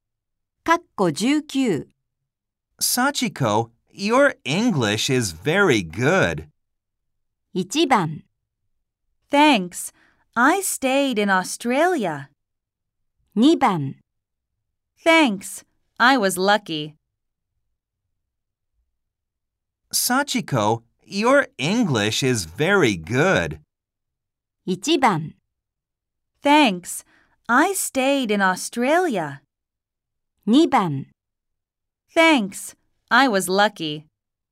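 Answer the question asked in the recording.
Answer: 1: Thanks, I stayed in Australia.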